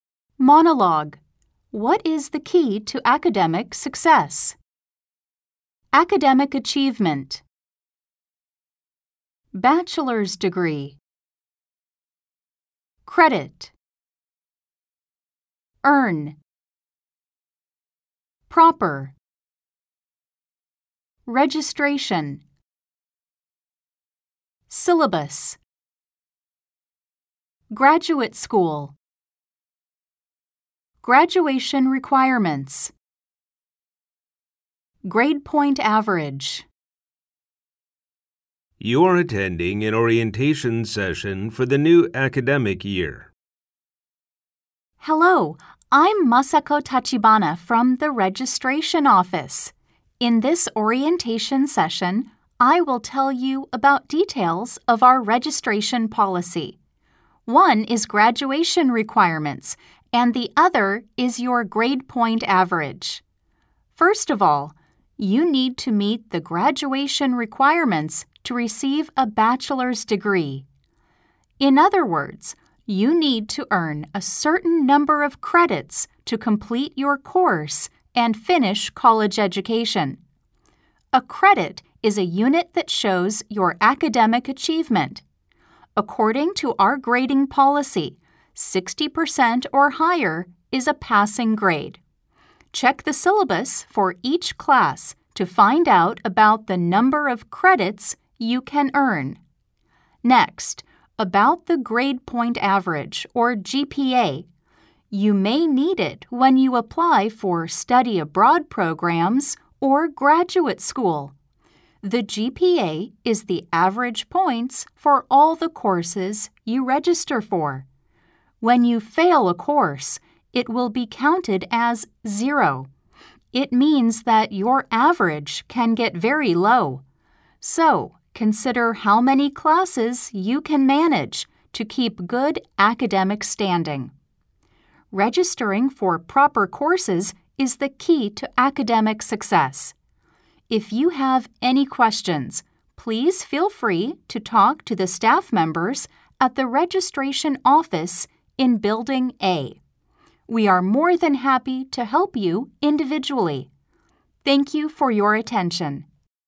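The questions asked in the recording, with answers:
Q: What is the key to academic success?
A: Registering for proper courses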